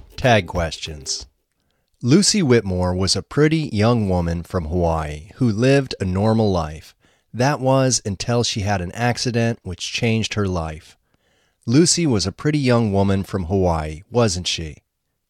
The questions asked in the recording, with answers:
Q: Lucy was a pretty young woman from Hawaii, wasn't she?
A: Yes, she was.